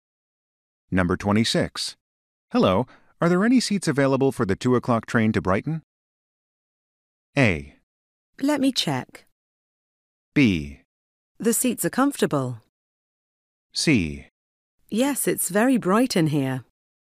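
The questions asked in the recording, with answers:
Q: Hello, are there any seats available for the 2 o'clock train to Brighton?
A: A: Let me check.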